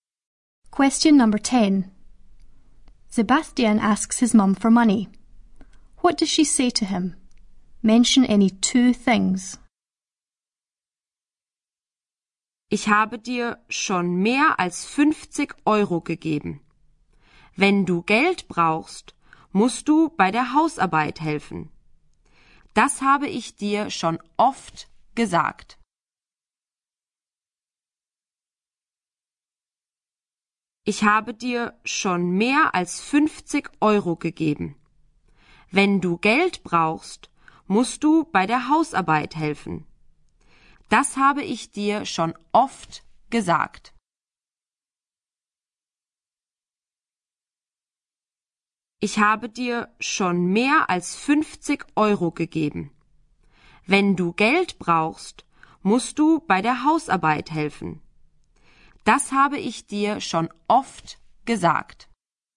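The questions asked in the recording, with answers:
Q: What does she say to him?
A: Any two: she has already given him more than 50 euros; if he needs money he has to help with the housework; she has told him that often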